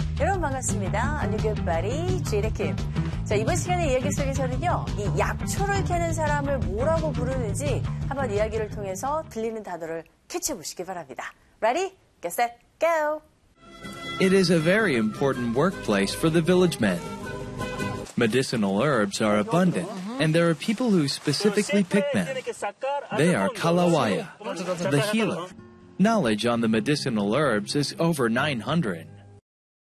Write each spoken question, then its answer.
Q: 이 약초를 캐는 사람을 뭐라고 부르는지 한번 이야기를 통해서 들리는 단어를 캐치해 보시기 바랍니다.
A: Did you catch that word? Good job, Kalawaya.